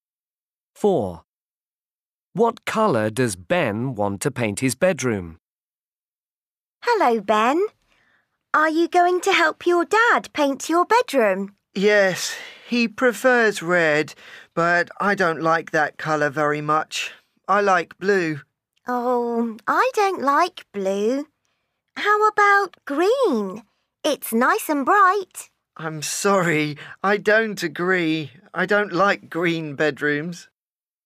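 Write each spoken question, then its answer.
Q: What colour does Ben want to paint his bedroom?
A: Blue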